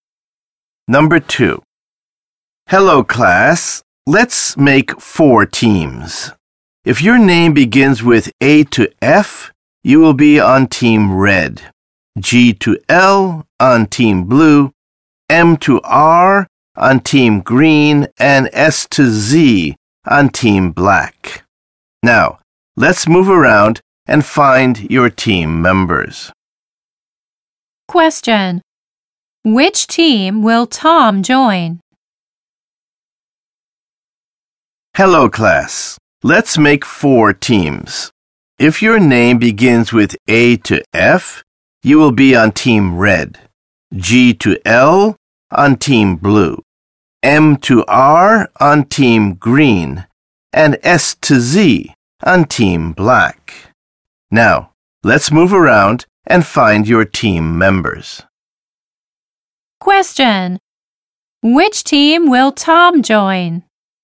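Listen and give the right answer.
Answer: Team black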